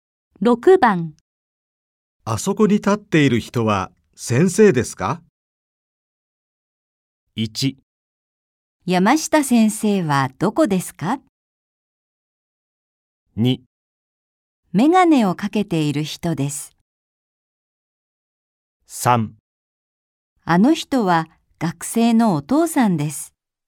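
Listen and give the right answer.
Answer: 3: あの人は学生のお父さんです。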